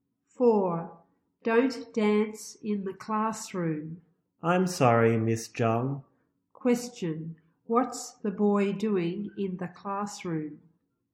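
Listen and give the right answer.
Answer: Dancing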